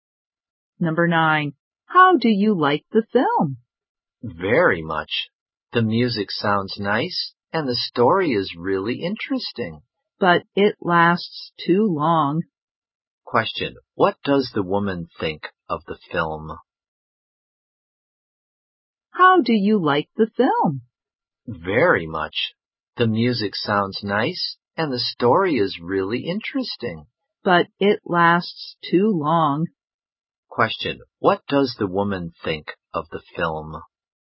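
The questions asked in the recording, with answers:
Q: Question, what does the woman think of the film?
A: She likes it very much, but it's too long.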